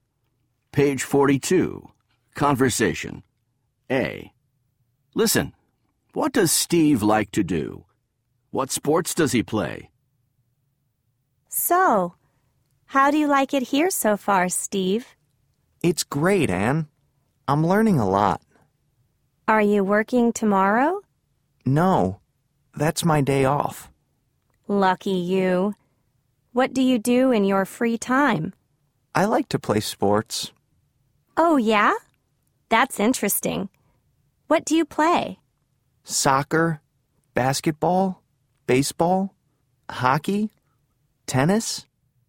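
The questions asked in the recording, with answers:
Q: what does Steve like to do?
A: play sports

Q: What sports does he play?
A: soccer, basketball, baseball, hockey, tennis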